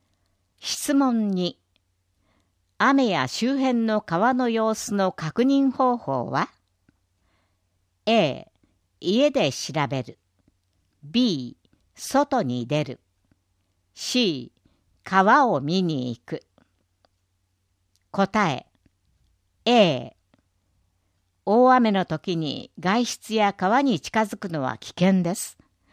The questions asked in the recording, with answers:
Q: 雨や周辺の川の様子の確認方法は?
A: 答え A。